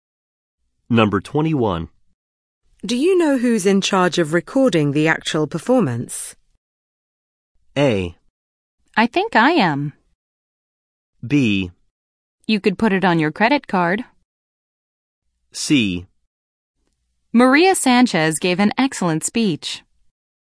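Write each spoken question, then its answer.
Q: Do you know who's in charge of recording the actual performance?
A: A: I think I am.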